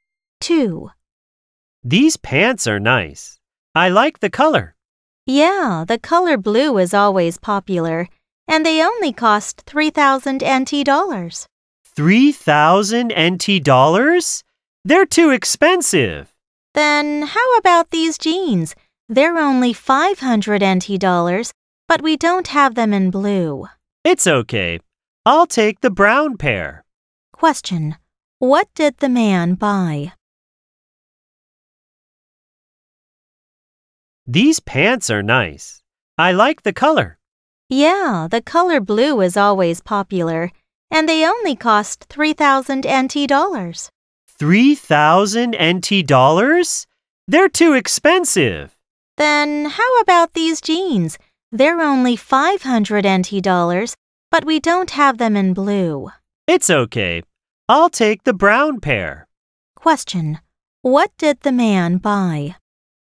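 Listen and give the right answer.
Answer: The brown jeans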